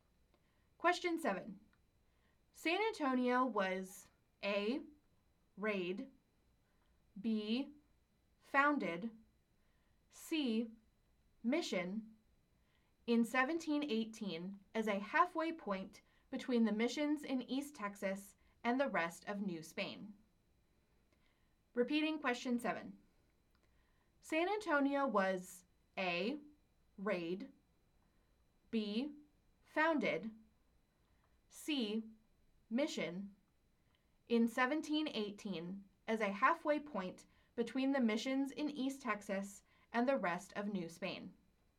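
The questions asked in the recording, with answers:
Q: San Antonio was A. raid, B. founded, C. mission in 1718 as a halfway point between the missions in East Texas and the rest of New Spain.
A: B: founded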